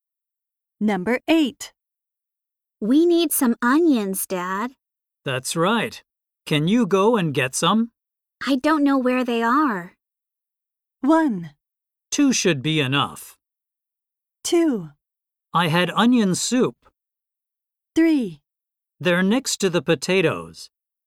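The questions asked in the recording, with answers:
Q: I don't know where they are.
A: 3: They're next to the potatoes.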